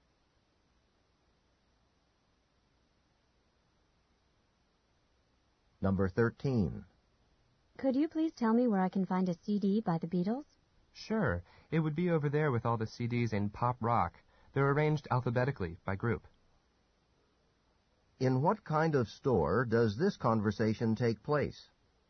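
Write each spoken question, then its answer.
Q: In what kind of store does this conversation take place?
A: A music store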